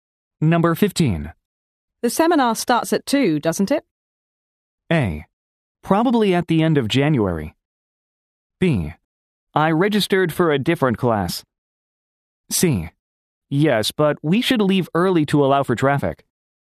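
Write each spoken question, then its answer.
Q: The seminar starts at 2, doesn't it?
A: C: Yes, but we should leave early to allow for traffic.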